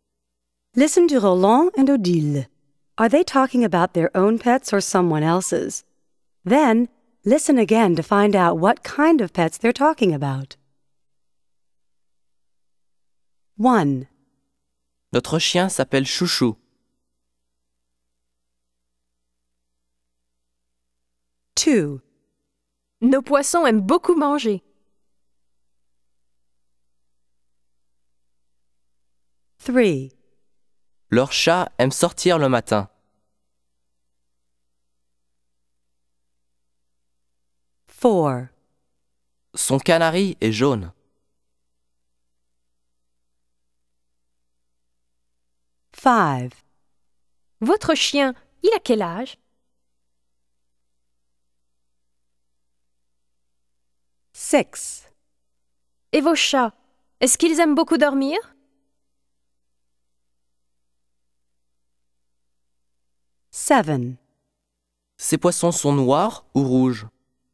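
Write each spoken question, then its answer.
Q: Are they talking about their own pets or someone else's?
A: Their own (a dog)

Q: Are they talking about their own pets or someone else's?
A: Their own (fish)

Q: Are they talking about their own pets or someone else's?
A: Someone else's (a cat)

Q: Are they talking about their own pets or someone else's?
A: Someone else's (a canary)

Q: Are they talking about their own pets or someone else's?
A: Someone else's (a dog)

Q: Are they talking about their own pets or someone else's?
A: Someone else's (cats)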